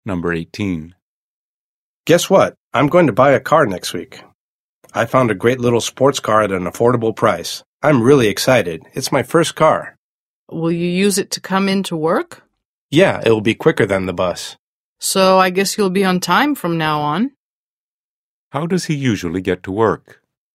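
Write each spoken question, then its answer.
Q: How does he usually get to work?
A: By bus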